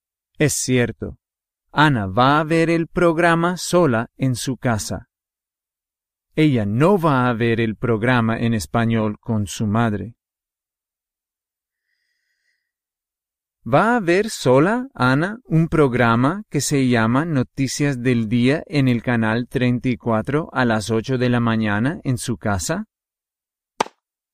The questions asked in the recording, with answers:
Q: ¿Va a ver sola, Ana, un programa que se llama Noticias del Día en el canal 34 a las 8 de la mañana en su casa?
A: Sí.